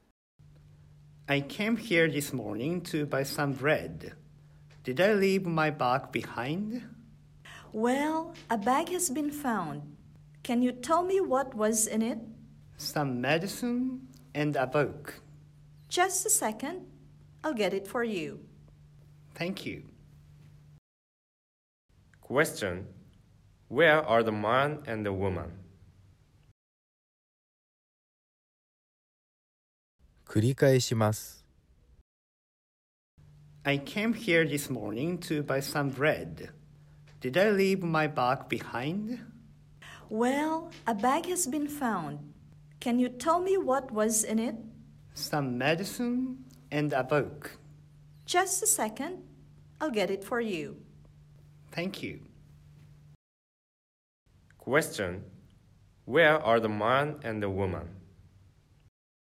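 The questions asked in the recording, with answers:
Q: Question. Where are the man and the woman?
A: At a bakery.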